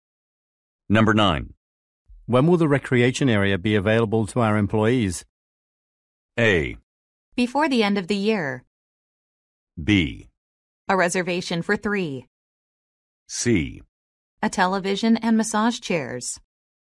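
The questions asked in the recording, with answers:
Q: When will the recreation area be available to our employees?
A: A: Before the end of the year.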